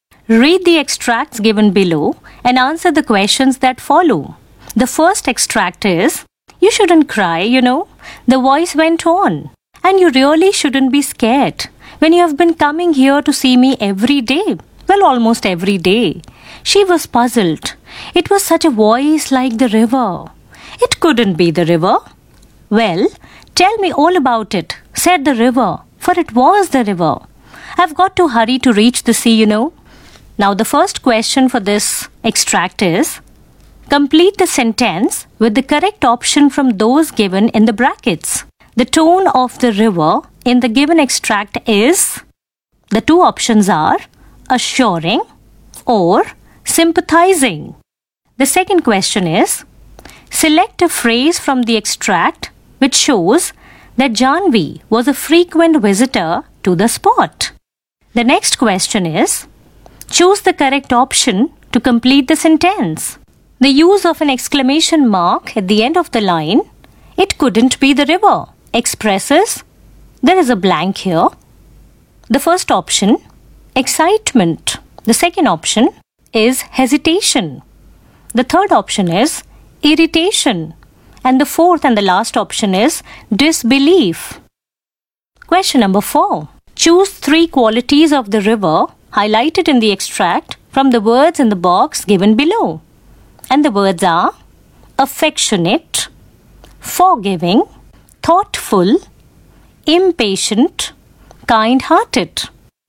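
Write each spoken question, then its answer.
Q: complete the sentence with the correct option from those given in the brackets. The tone of the river in the given extract is, the two options are assuring or sympathizing.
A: assuring

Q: select a phrase from the extract which shows that Janvi was a frequent visitor to the spot.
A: you have been coming here to see me every day

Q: choose the correct option to complete the sentence. The use of an exclamation mark at the end of the line, "It couldn't be the river," expresses, there is a blank here.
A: disbelief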